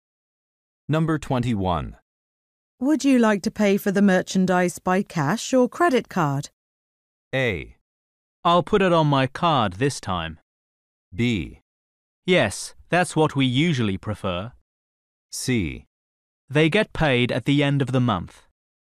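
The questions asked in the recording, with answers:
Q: Would you like to pay for the merchandise by cash or credit card?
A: A: I'll put it on my card this time.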